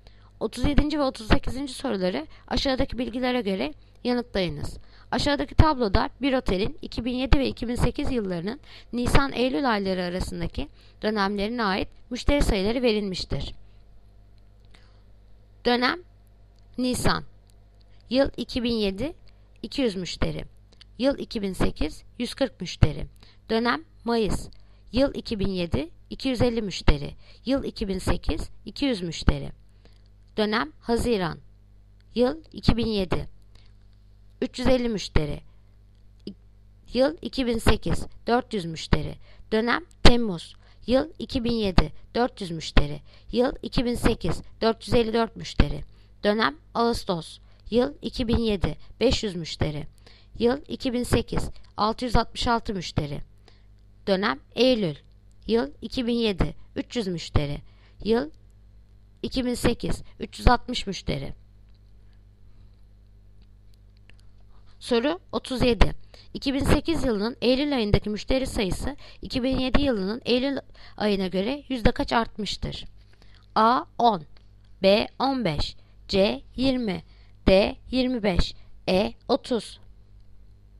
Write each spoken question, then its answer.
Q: 2008 yılının Eylül ayındaki müşteri sayısı 2007 yılının Eylül ayına göre yüzde kaç artmıştır?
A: Yanıt Ceyhan 20.